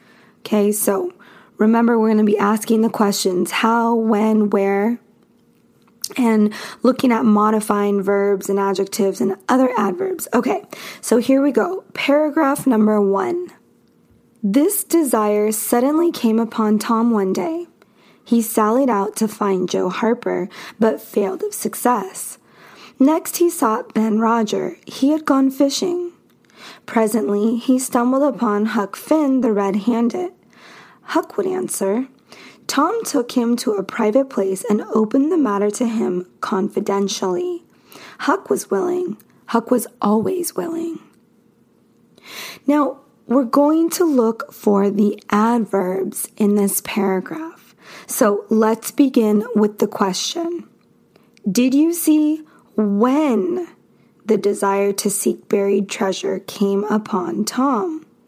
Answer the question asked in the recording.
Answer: So our adverb is suddenly.